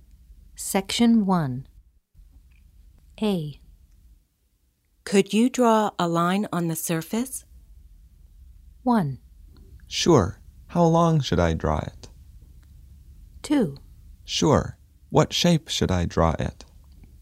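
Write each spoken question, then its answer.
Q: Could you draw a line on the surface?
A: 1: Sure. How long should I draw it?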